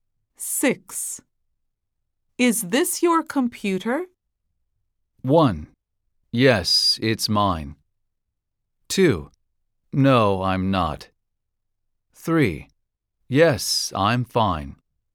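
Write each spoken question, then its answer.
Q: Is this your computer?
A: 1: Yes, it's mine.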